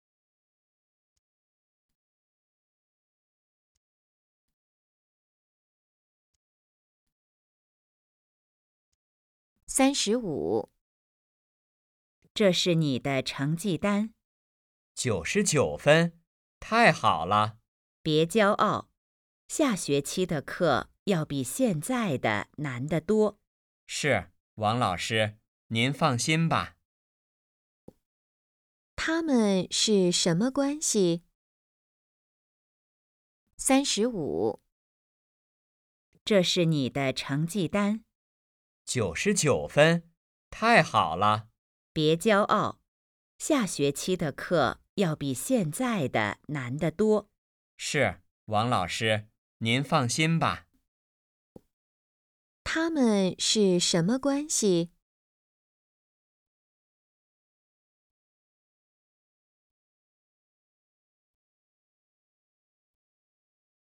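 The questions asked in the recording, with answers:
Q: 他们是什么关系?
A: 老师和学生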